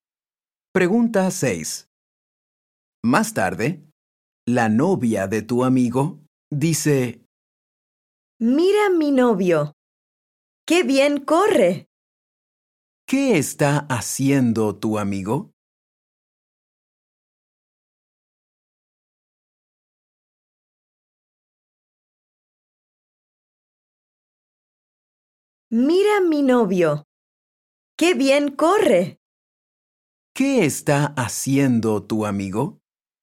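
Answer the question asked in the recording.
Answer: Está corriendo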